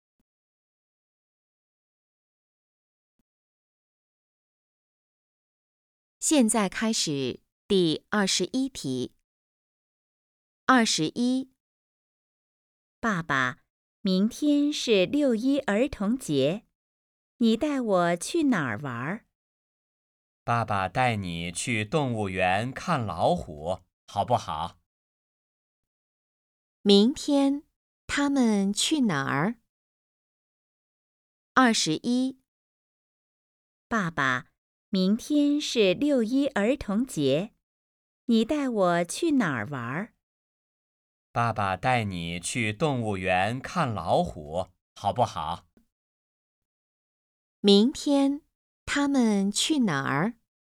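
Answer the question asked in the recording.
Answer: 动物园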